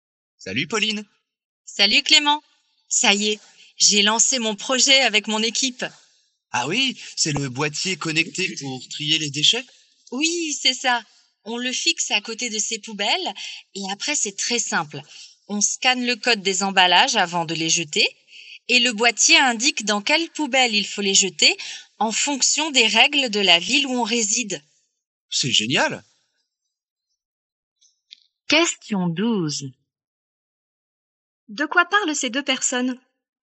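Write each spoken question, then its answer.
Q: De quoi parlent ces deux personnes?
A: D'un boîtier connecté pour trier les déchets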